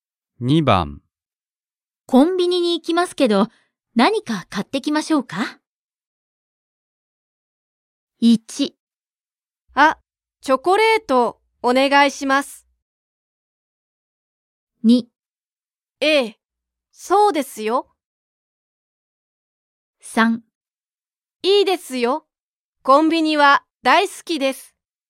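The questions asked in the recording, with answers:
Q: コンビニに行きますけど、何か買ってきましょうか?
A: 1: あ、チョコレートお願いします。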